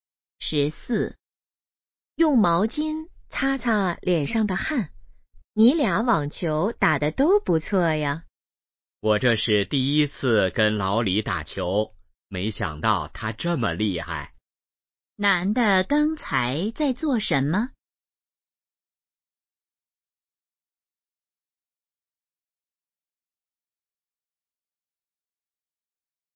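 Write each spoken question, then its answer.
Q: 男的刚才在做什么?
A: 打网球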